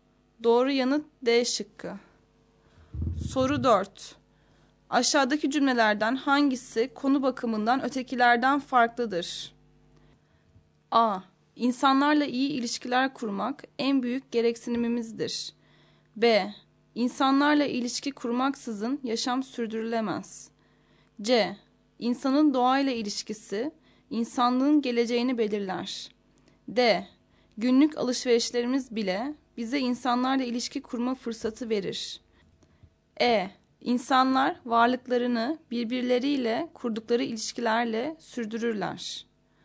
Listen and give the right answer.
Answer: Doğru yanıt C şıkkı.